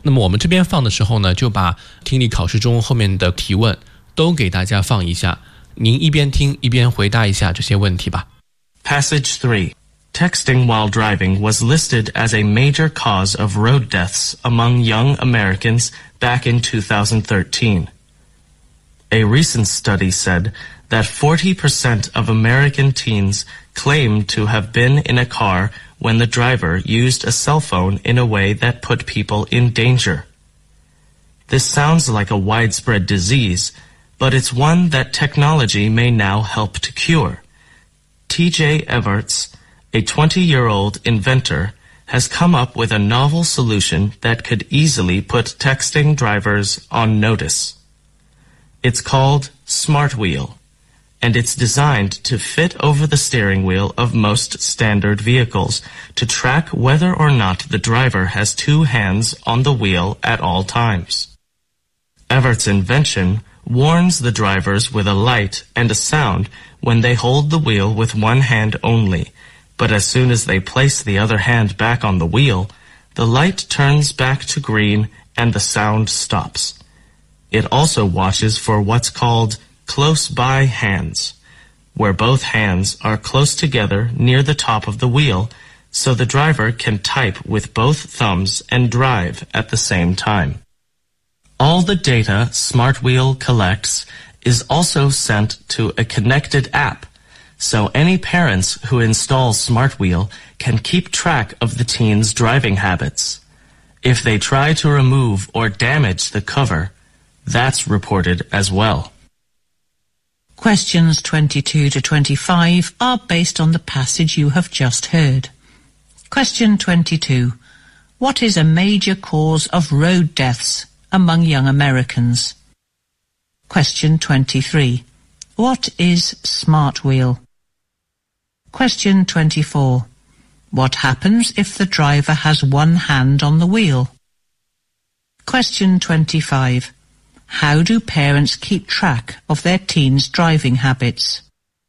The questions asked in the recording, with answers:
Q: What is a major cause of road deaths among young Americans?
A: Texting while driving is one of the major causes to road deaths in America.

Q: What is Smart Wheel?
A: Smart wheel is a novel solution invented by a 20-year-old inventor.

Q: What happens if the driver has one hand on the wheel?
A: The smart wheel may send off light and sound to warn the drivers.

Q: How do parents keep track of their teen's driving habits?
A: Because the data smart wheel collects is sent to a connected APP.